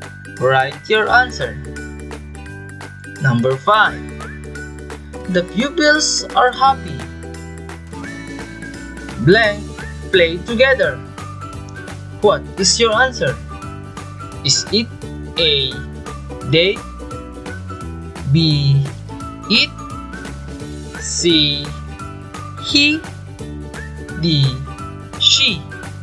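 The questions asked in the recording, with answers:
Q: The pupils are happy. Blank play together. What is your answer?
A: A: They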